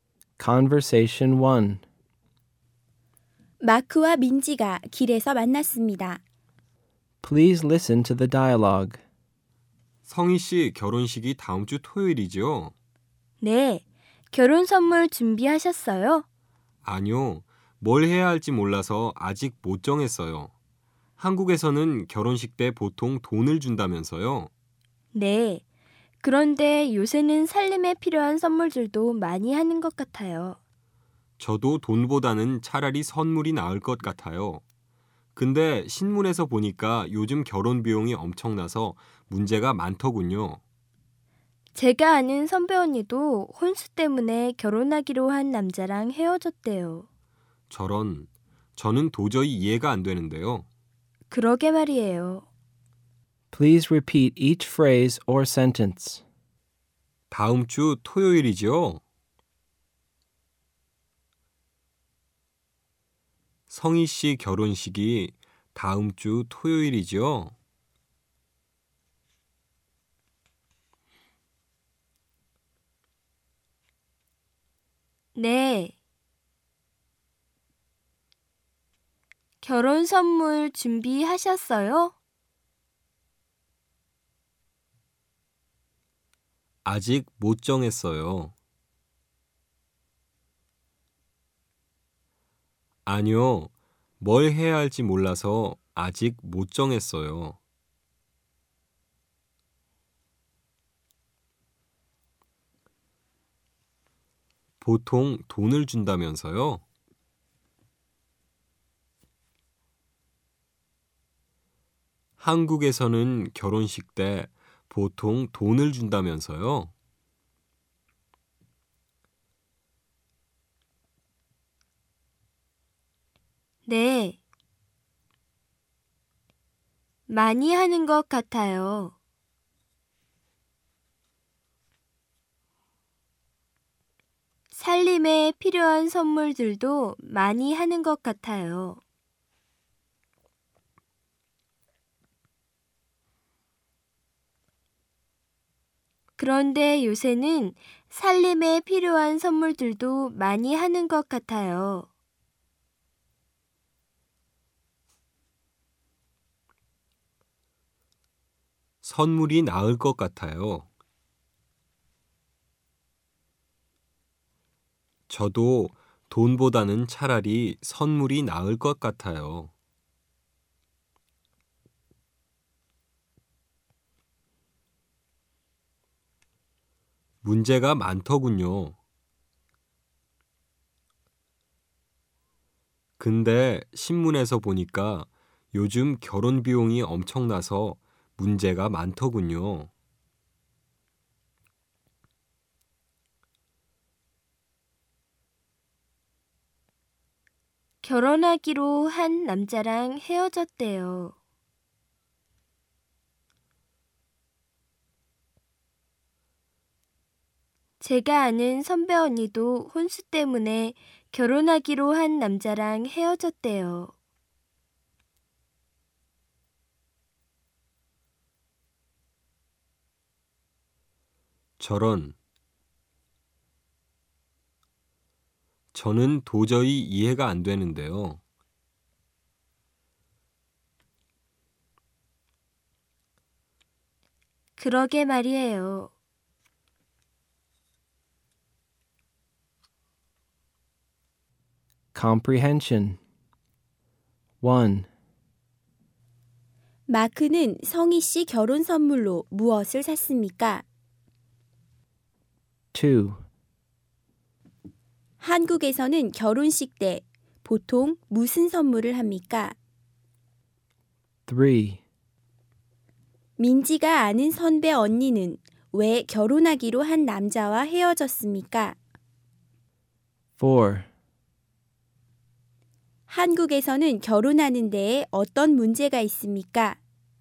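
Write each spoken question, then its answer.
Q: 한국에서는 결혼식 때 보통 무슨 선물을 합니까?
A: 보통 돈을 줍니다 (요새는 살림에 필요한 선물도 많이 합니다)

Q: 민지가 아는 선배 언니는 왜 결혼하기로 한 남자와 헤어졌습니까?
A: 혼수 때문에

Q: 한국에서는 결혼하는 데에 어떤 문제가 있습니까?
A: 결혼 비용이 엄청납니다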